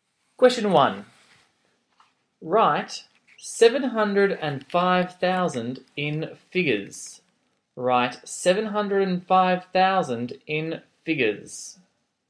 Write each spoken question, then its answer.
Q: Write 705,000 in figures.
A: Your answer should be 705,000, which is 705,000. 705 with 3 zeros.